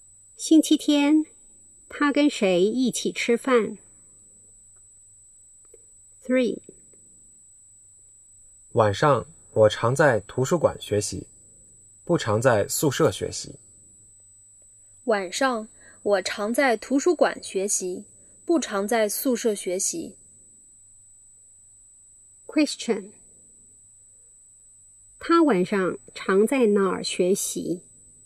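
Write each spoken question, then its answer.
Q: 他晚上常在哪儿学习?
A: 图书馆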